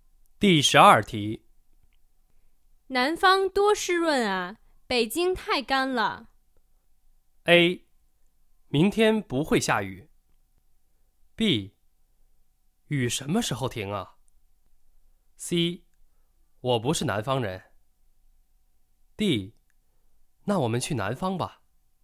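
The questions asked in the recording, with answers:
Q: 南方多湿润啊,北京太干了。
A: D: 那我们去南方吧。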